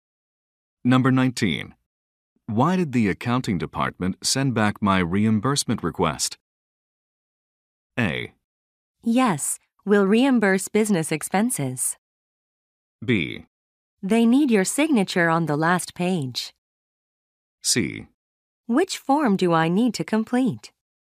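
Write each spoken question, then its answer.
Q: Why did the accounting department send back my reimbursement request?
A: B: They need your signature on the last page.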